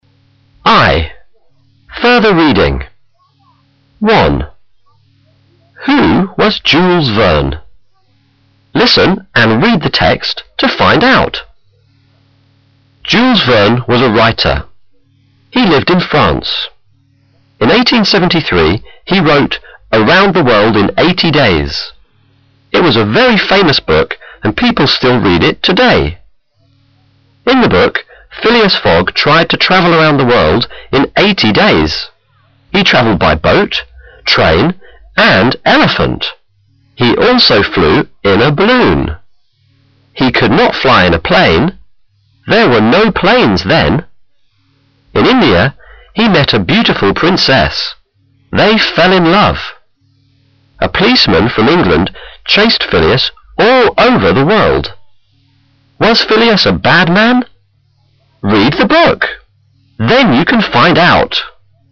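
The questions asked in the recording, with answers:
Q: Who was Jules Verne?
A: A writer who lived in France (he wrote Around the World in 80 Days)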